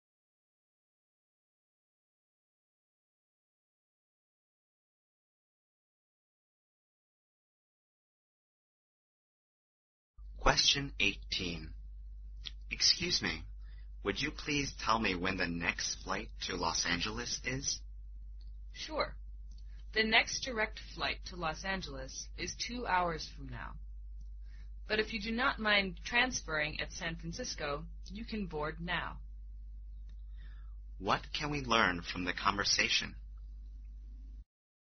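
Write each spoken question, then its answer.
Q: What can we learn from the conversation?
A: The man can board a flight now if he transfers at San Francisco.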